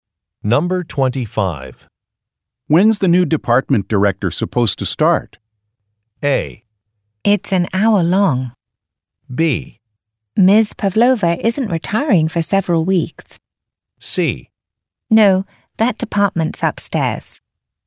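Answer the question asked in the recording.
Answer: B: Ms. Pavlova isn't retiring for several weeks.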